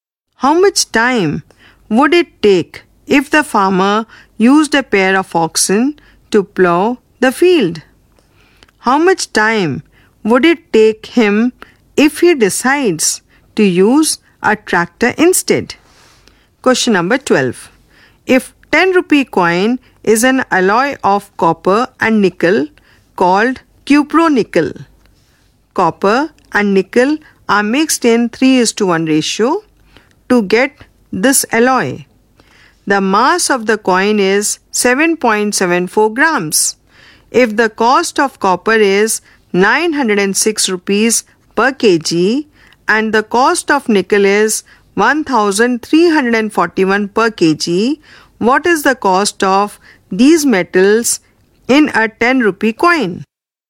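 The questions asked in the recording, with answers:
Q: If the cost of copper is 906 rupees per kg and the cost of nickel is 1341 per kg, what is the cost of these metals in a 10 rupee coin?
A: About 7.85 rupees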